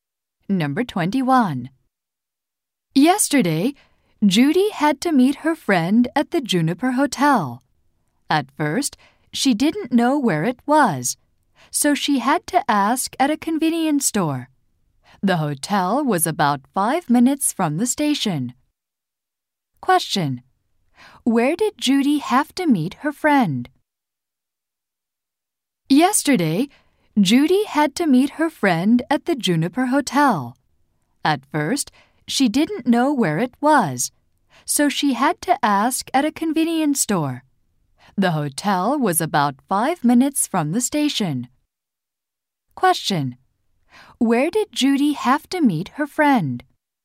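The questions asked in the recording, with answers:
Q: Question. Where did Judy have to meet her friend?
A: At the Juniper Hotel.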